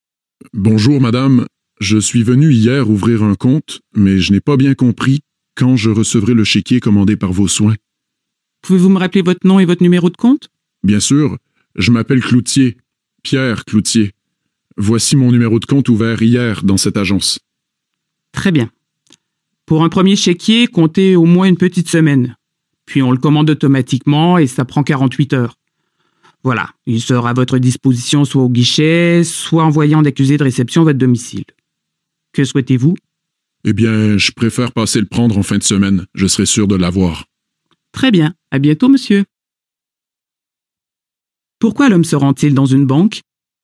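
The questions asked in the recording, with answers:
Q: Pourquoi l'homme se rend-il dans une banque?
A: Pour savoir quand il recevra son premier chéquier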